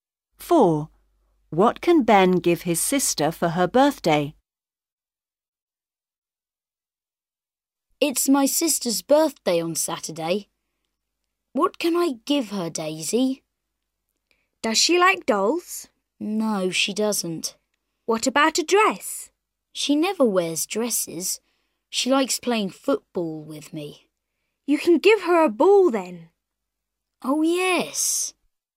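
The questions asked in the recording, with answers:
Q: What can Ben give his sister for her birthday?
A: a ball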